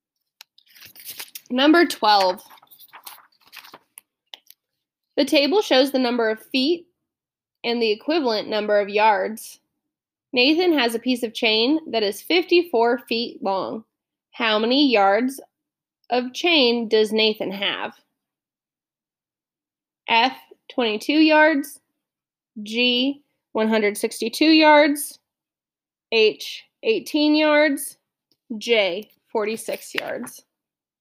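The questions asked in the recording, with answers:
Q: How many yards of chain does Nathan have?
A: H: 18 yards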